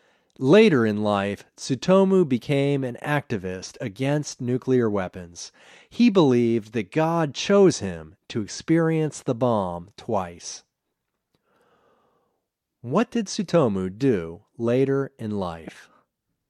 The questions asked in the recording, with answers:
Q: What did Tsutomu do later in life?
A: Later in life, Tsutomu became an activist against nuclear weapons.